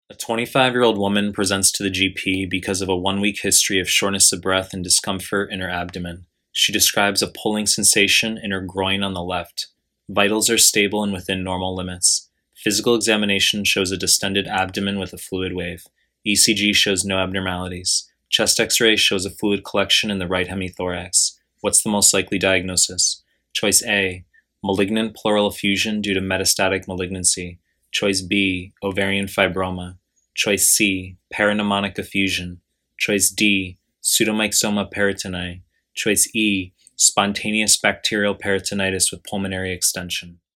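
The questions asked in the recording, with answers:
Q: What's the most likely diagnosis?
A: B: ovarian fibroma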